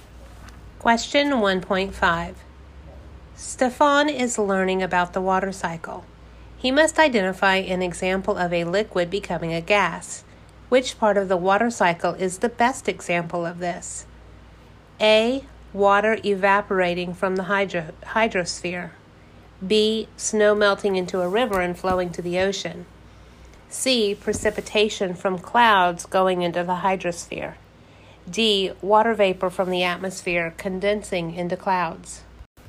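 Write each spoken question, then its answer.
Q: Which part of the water cycle is the best example of this?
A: A: Water evaporating from the hydrosphere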